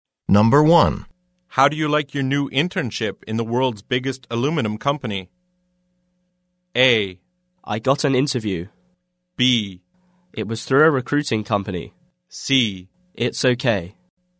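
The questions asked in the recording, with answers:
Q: How do you like your new internship in the world's biggest aluminum company?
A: C: It's okay.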